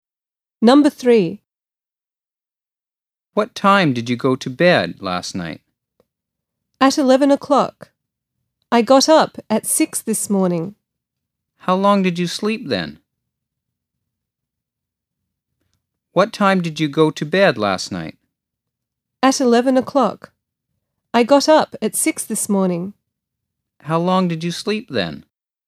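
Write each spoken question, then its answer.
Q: How long did you sleep then?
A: 7 hours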